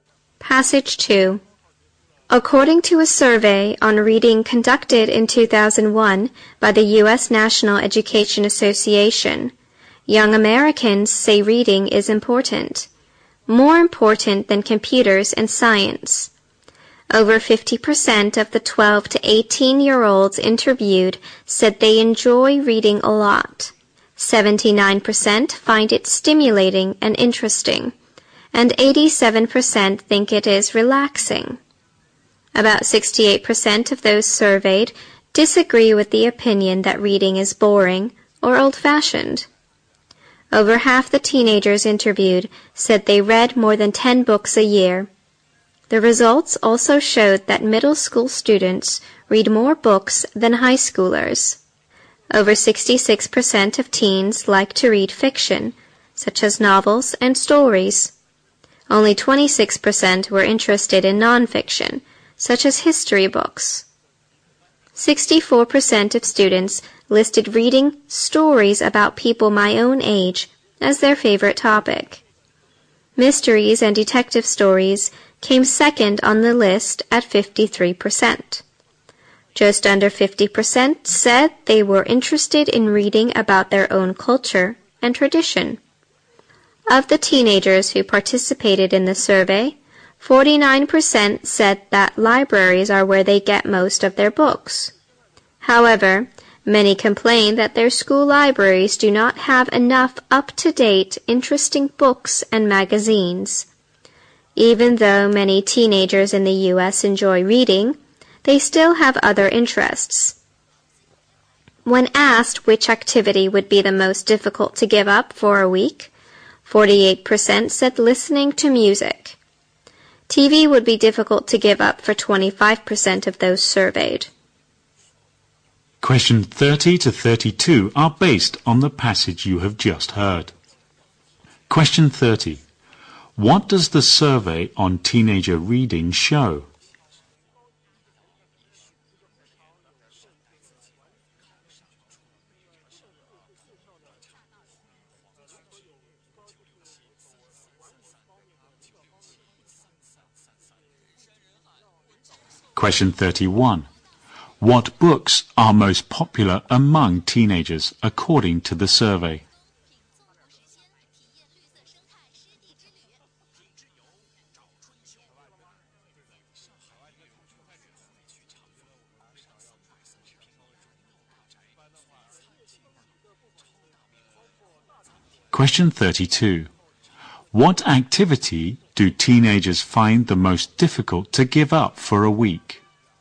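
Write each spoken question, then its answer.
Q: What does the survey on teenager reading show?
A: Young Americans think reading is important and enjoy it.

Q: What books are most popular among teenagers according to the survey?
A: Fiction, especially stories about people their own age

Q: What activity do teenagers find the most difficult to give up for a week?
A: Listening to music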